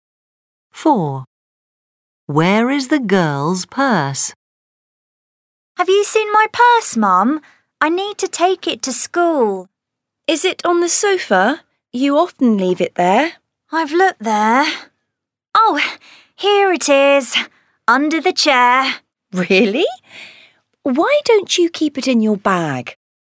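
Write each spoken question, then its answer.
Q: Where is the girl's purse?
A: under the chair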